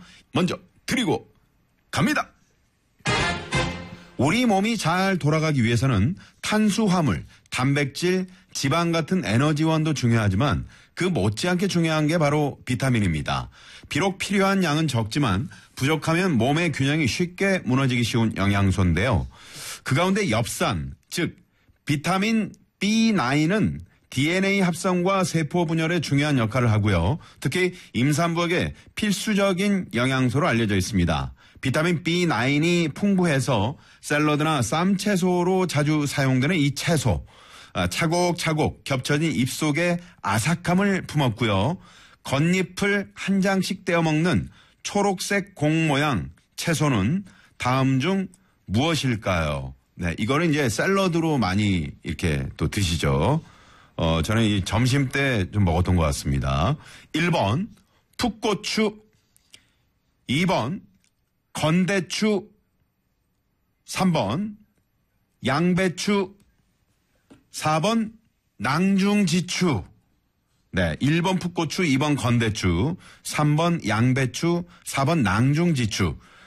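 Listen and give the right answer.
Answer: 3번: 양배추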